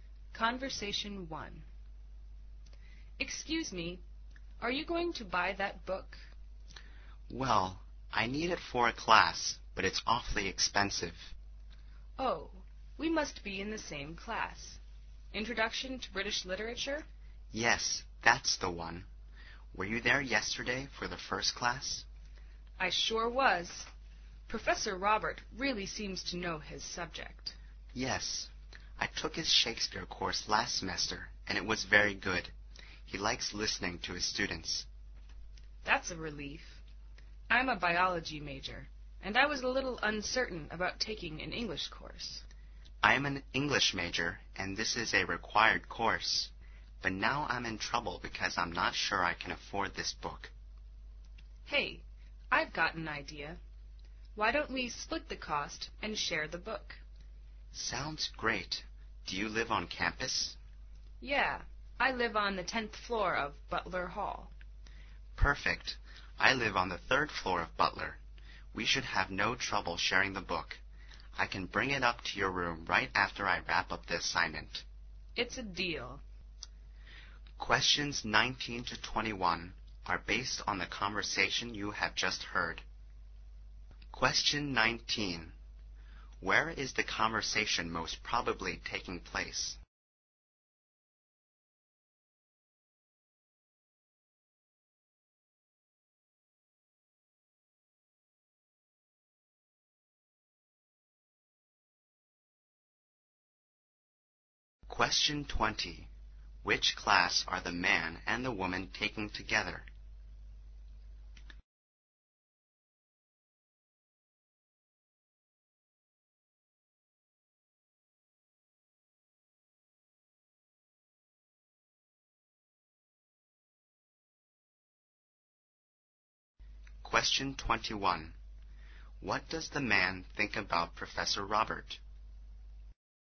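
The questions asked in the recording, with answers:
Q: Where is the conversation most probably taking place?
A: In a bookstore

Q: Which class are the man and the woman taking together?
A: Introduction to British Literature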